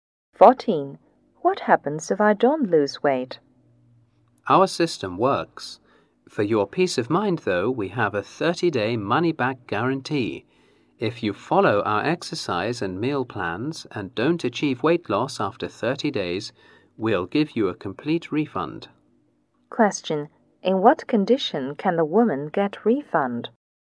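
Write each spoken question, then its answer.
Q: In what condition can the woman get refund?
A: If she follows the exercise and meal plans and has not lost weight after 30 days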